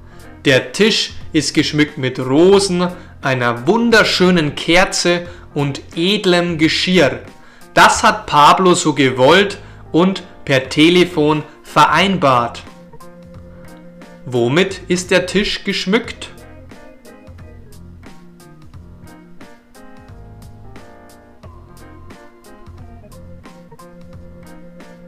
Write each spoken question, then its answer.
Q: Womit ist der Tisch geschmückt?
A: Mit Rosen, einer wunderschönen Kerze und edlem Geschirr.